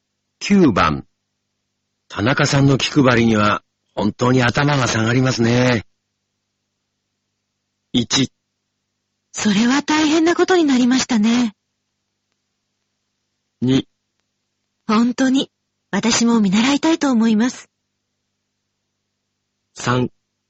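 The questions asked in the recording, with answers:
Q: 田中さんの気配りには本当に頭が下がりますね。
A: 2: 本当に、私も見習いたいと思います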